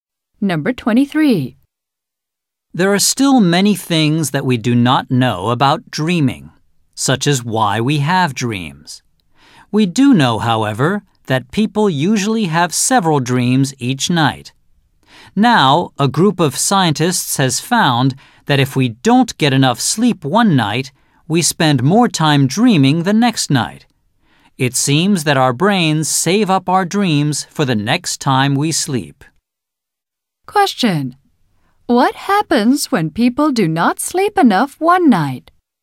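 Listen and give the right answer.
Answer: They spend more time dreaming the next night.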